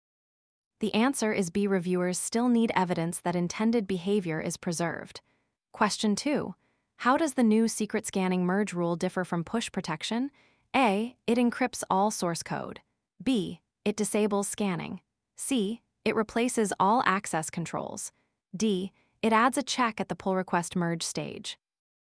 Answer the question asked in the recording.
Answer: The answer is D.